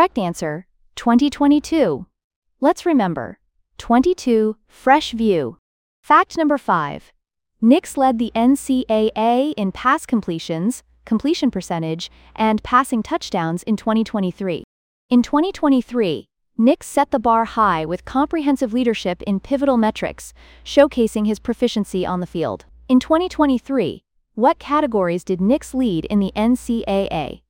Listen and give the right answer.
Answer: pass completions, completion percentage, passing touchdowns.